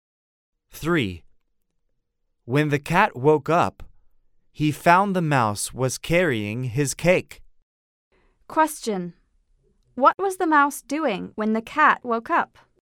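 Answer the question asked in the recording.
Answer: He was carrying the cat's cake.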